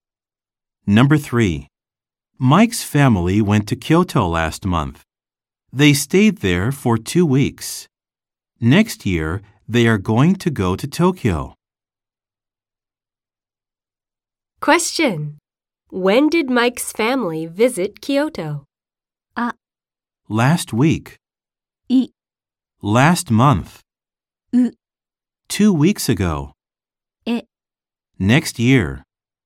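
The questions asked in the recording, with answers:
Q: When did Mike's family visit Kyoto?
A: I: Last month.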